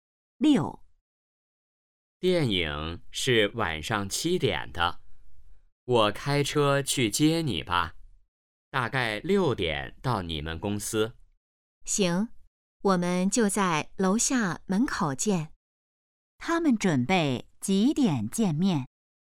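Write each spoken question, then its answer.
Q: 他们准备几点见面?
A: 6点左右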